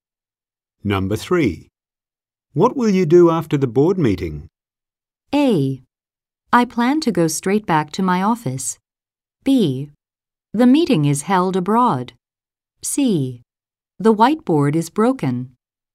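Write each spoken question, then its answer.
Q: What will you do after the board meeting?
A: A: I plan to go straight back to my office.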